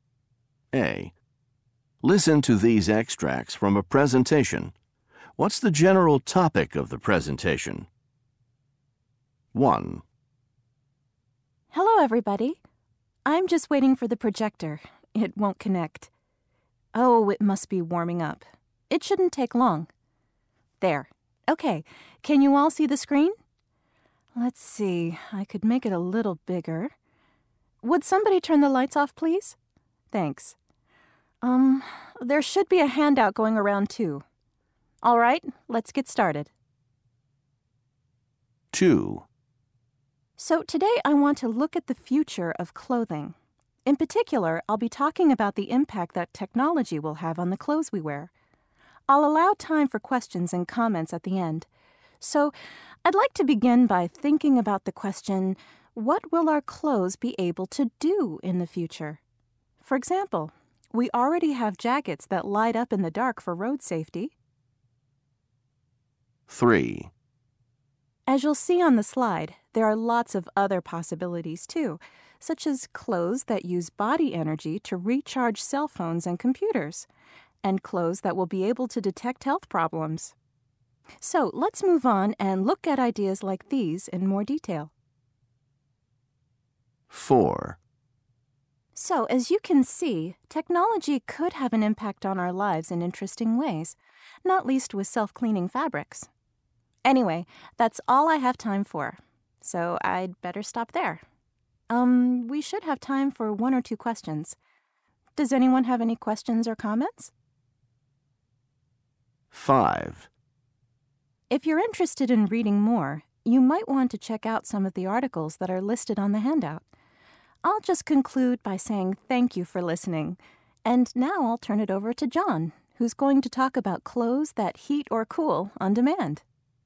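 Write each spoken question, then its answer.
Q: What's the general topic of the presentation?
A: The future of clothing and the impact of technology on the clothes we wear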